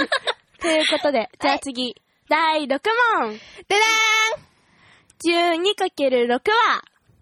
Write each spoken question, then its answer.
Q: 12×6 は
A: 72。